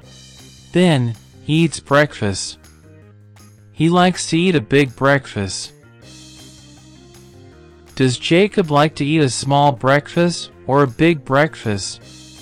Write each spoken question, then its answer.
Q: Does Jacob like to eat a small breakfast or a big breakfast?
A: Big. He likes to eat a big breakfast.